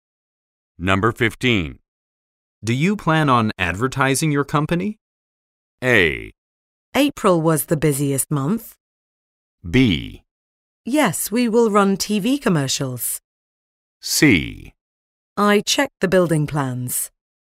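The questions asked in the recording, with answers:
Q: Do you plan on advertising your company?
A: B: Yes, we will run TV commercials.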